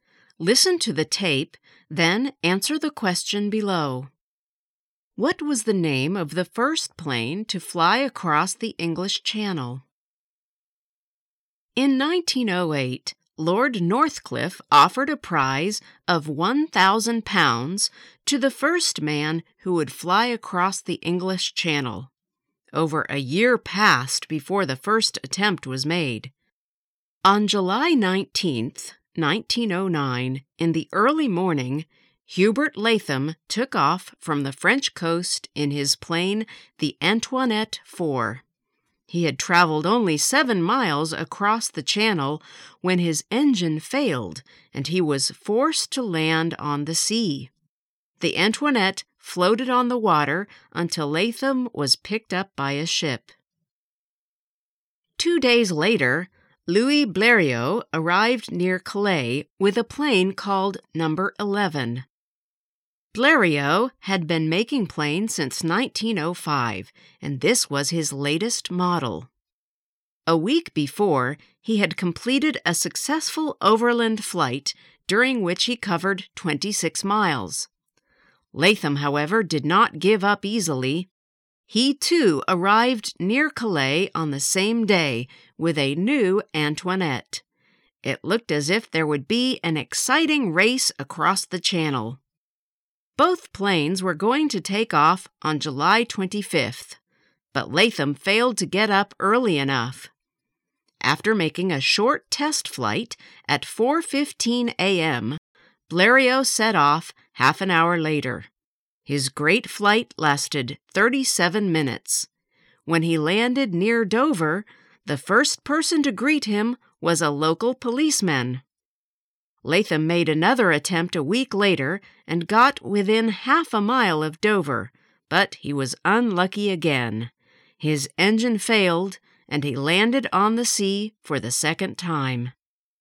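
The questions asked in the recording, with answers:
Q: What was the name of the first plane to fly across the English Channel?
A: No. 11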